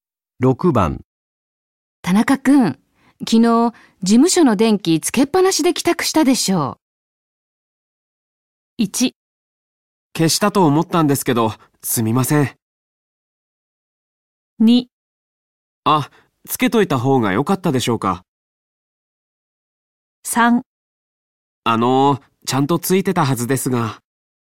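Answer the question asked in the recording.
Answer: 1: 消したと思ったんですけど、すみません。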